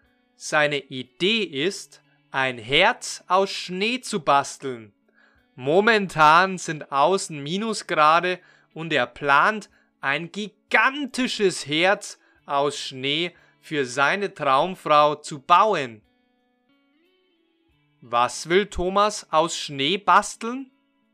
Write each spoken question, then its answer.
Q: Was will Thomas aus Schnee basteln?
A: Ein Herz. Thomas will ein Herz aus Schnee basteln.